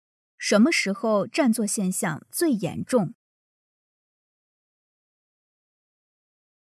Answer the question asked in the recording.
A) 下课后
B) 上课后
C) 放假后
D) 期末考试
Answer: D) 期末考试

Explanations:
由"特别是在期末考试、考研、考公务员期间"可知答案D正确。

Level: 汉语水平考试(MHK)三级